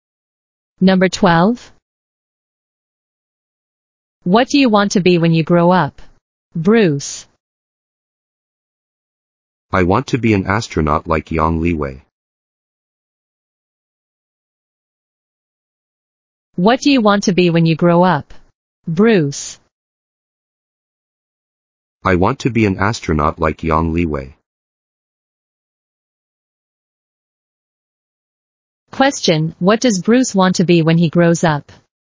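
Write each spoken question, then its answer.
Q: what does Bruce want to be when he grows up?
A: An astronaut.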